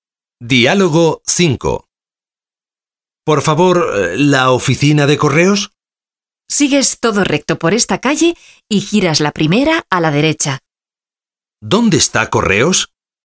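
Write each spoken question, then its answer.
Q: ¿Dónde está Correos?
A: Todo recto por esta calle y la primera a la derecha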